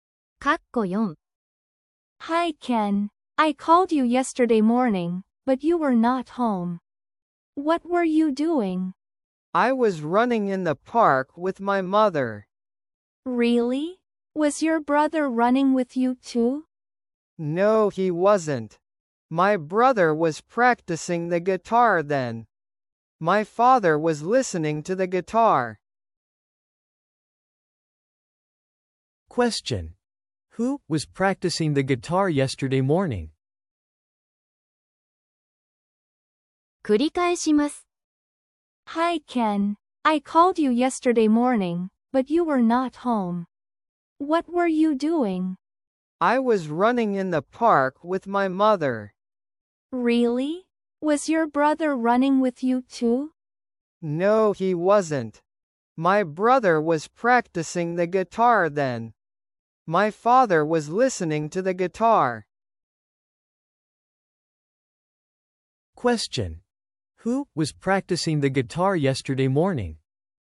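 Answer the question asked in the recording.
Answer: Ken's brother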